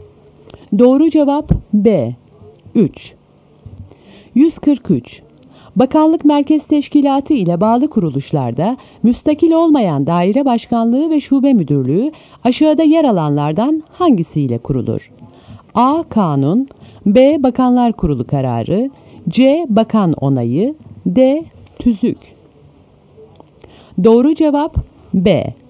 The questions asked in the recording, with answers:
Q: Bakanlık merkez teşkilatı ile bağlı kuruluşlarda müstakil olmayan daire başkanlığı ve şube müdürlüğü aşağıda yer alanlardan hangisiyle kurulur?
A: Doğru cevap B.